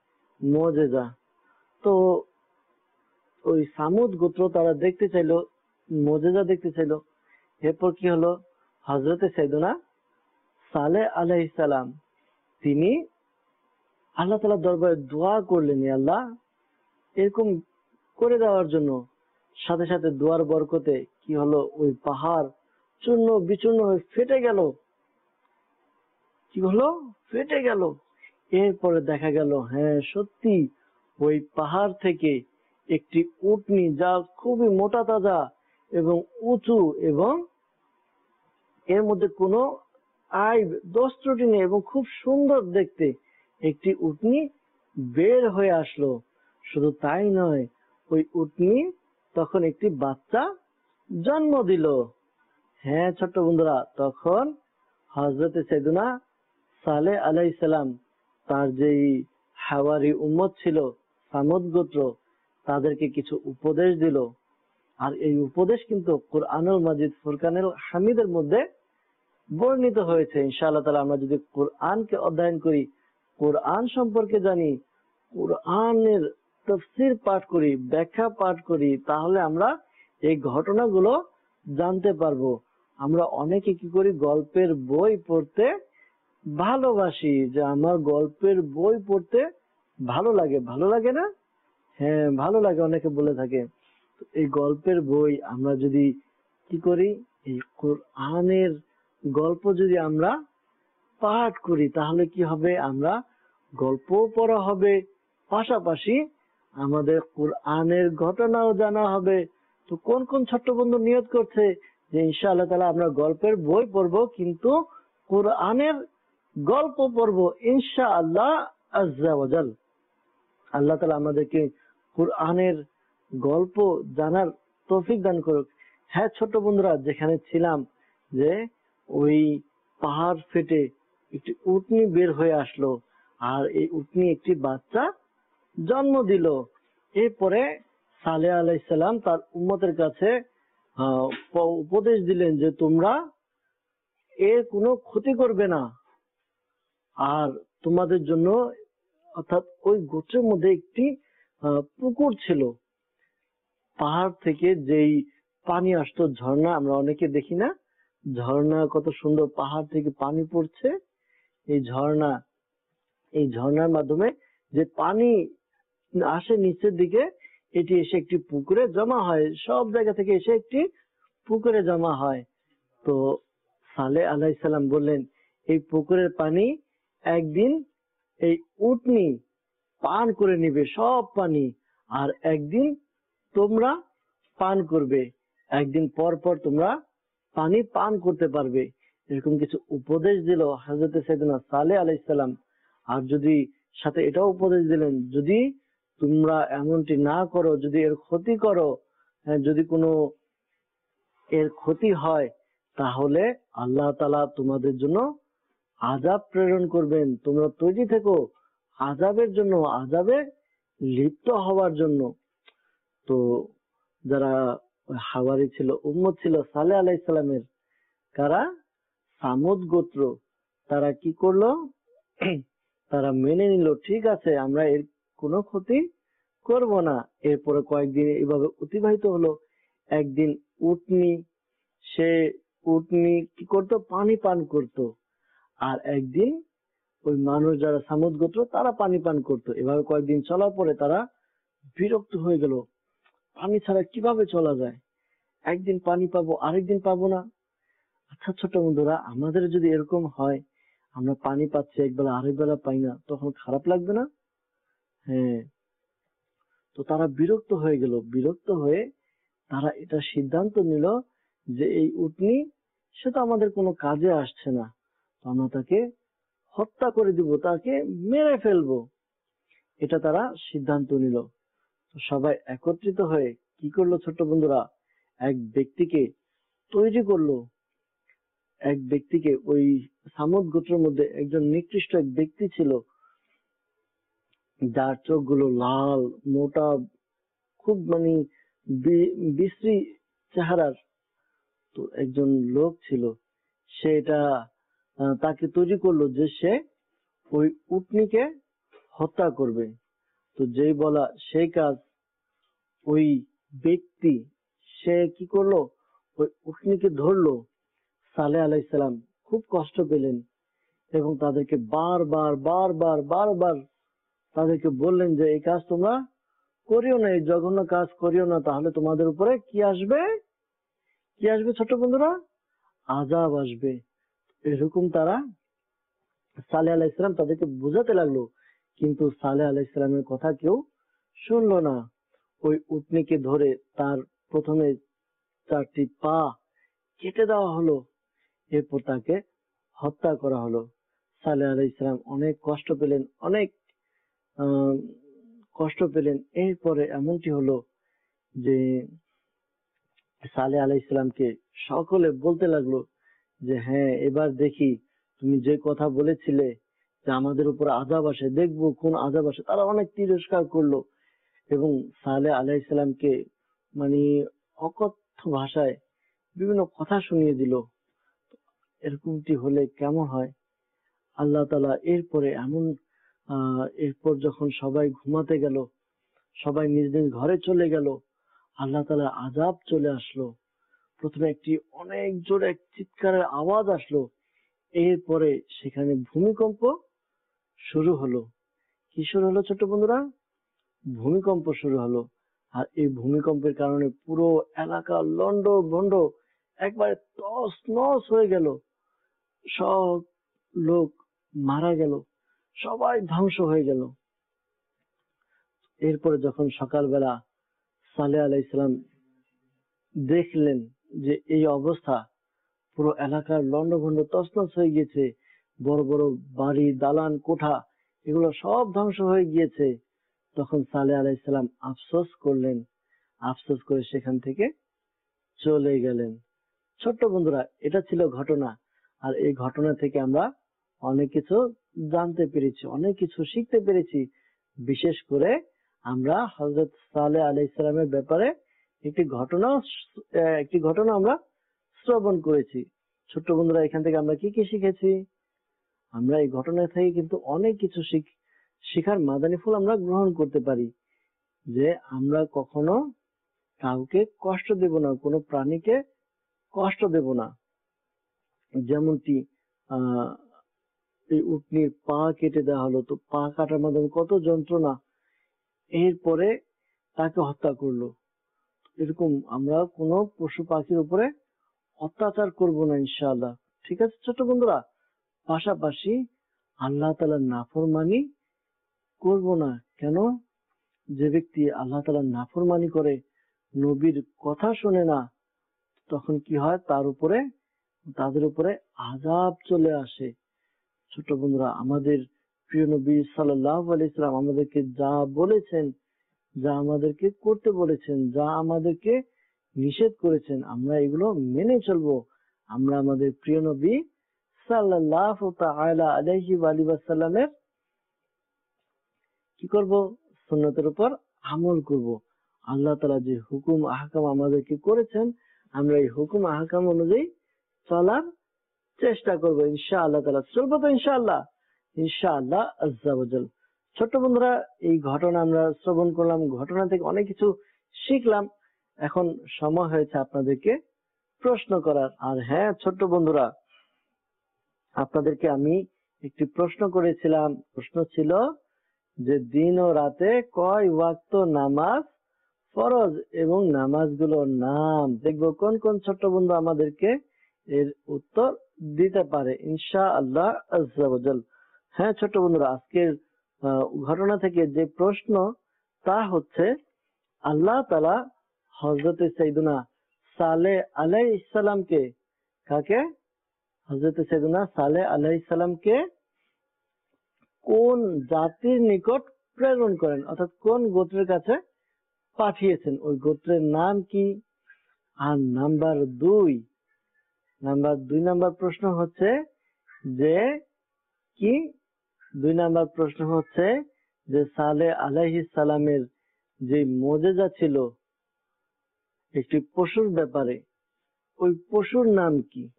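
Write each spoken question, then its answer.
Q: হযরতে সাইয়েদুনা সালেহ আলাইহিস সালামকে কোন জাতির নিকট প্রেরণ করেন, অর্থাৎ কোন গোত্রের কাছে পাঠিয়েছেন, ওই গোত্রের নাম কি?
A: সামুদ গোত্র

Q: সালে আলাইহিস সালামের যে মুজিজা ছিল একটি পশুর ব্যাপারে, ওই পশুর নাম কি?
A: উটনি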